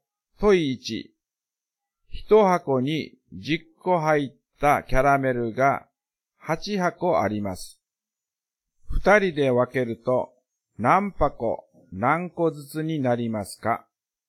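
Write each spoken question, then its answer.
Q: 一箱に十個入ったキャラメルが八箱あります。二人で分けると何箱何個ずつになりますか?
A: 4箱40個ずつ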